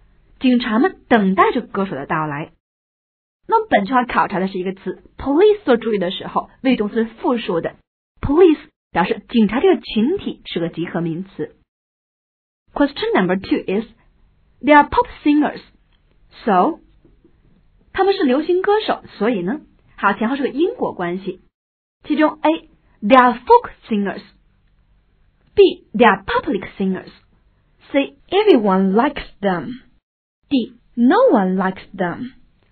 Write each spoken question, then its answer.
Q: they are pop singers. So, 他们是流行歌手,所以呢?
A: 答案应该是 C, everyone likes them